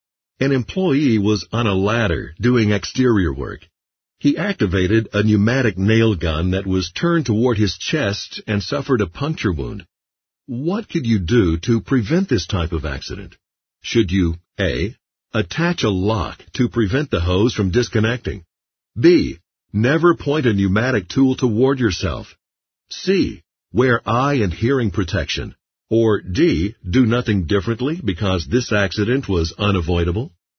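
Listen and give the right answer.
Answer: B: Never point a pneumatic tool toward yourself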